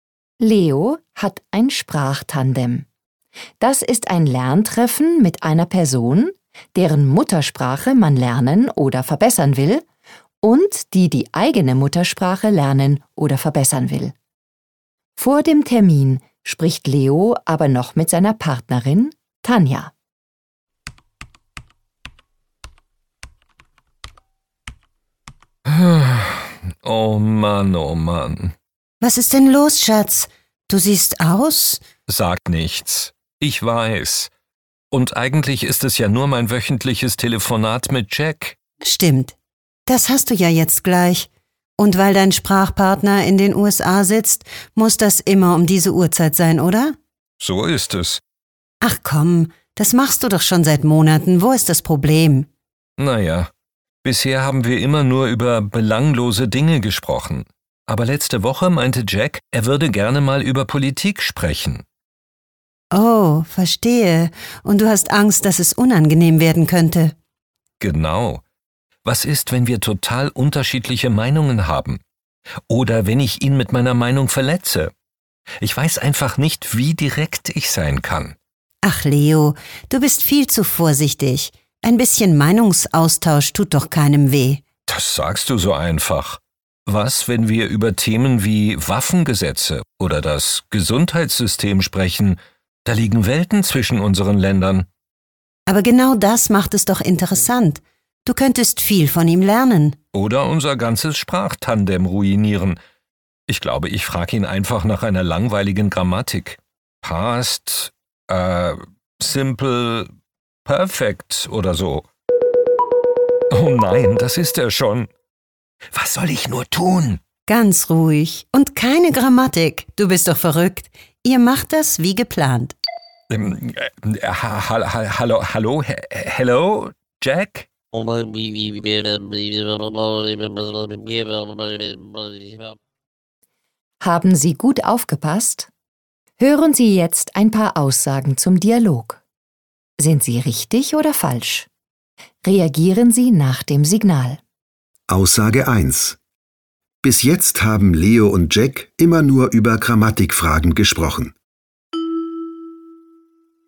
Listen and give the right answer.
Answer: Falsch.